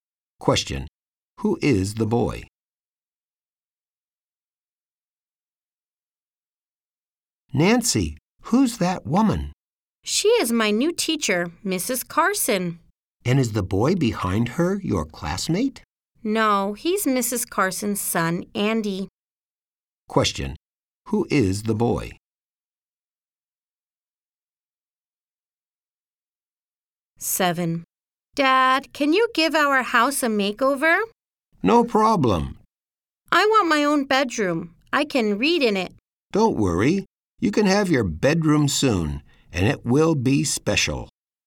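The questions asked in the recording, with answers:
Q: Who is the boy?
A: Mrs. Carson's son, Andy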